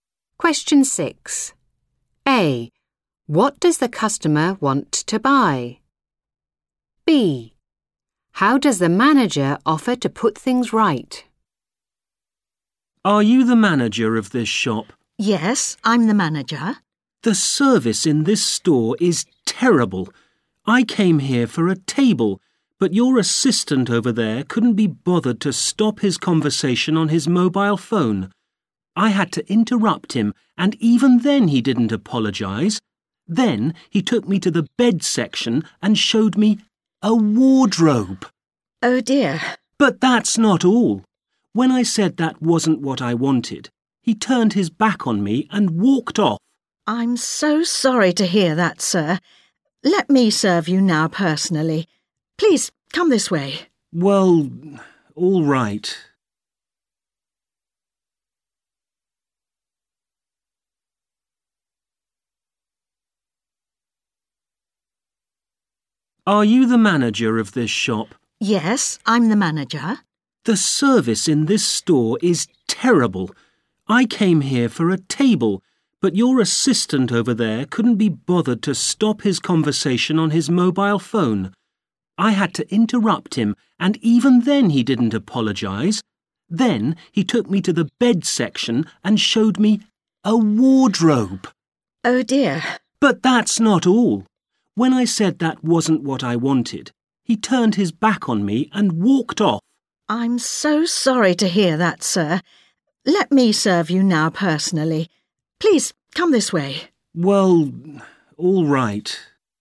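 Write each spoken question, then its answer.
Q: What does the customer want to buy?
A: A table

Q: How does the manager offer to put things right?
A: By serving him personally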